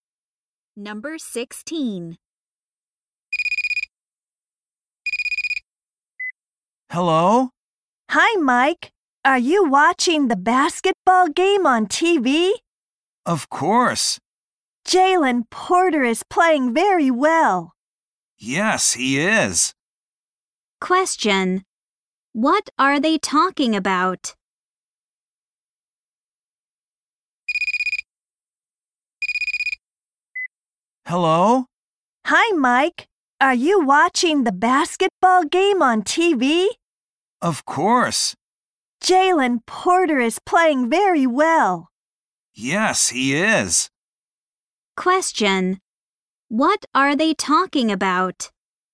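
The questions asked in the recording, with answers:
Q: What are they talking about?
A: A basketball game on TV.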